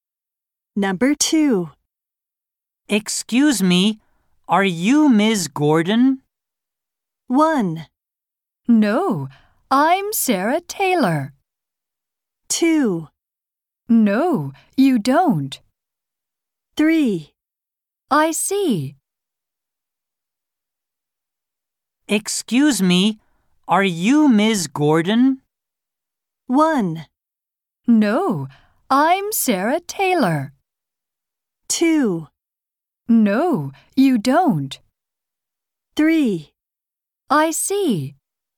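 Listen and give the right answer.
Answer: 1: No, I'm Sarah Taylor.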